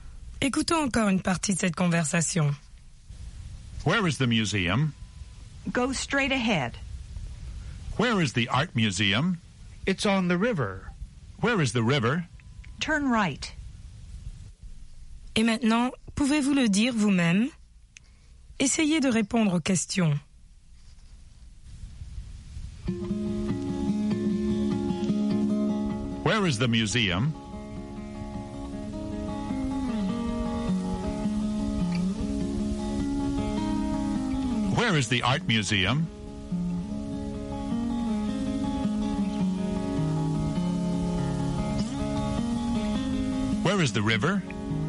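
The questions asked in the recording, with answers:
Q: Where is the museum?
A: Go straight ahead.

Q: Where is the art museum?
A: It's on the river.

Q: Where is the river?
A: Turn right.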